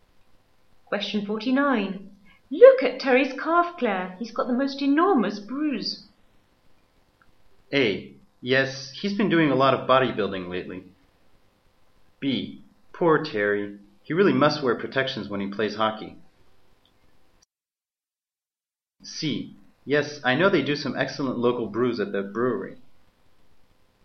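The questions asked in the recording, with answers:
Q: Look at Terry's calf, Claire.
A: B: Poor Terry. He really must wear protections when he plays hockey.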